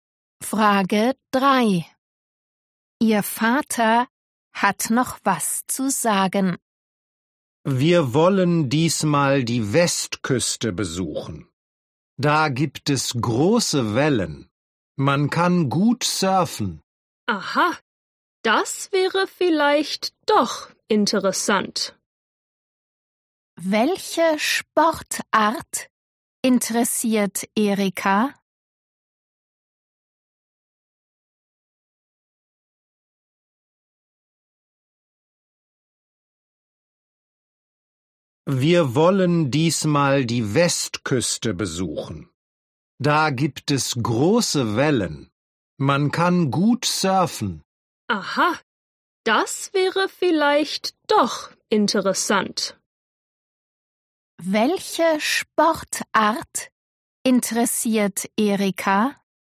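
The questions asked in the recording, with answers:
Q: Welche Sportart interessiert Erika?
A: Surfen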